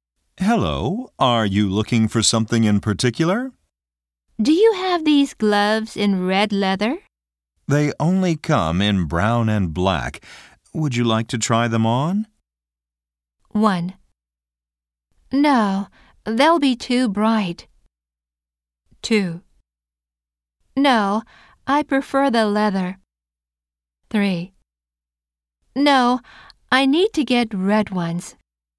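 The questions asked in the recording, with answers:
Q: Would you like to try them on?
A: 3: No, I need to get red ones.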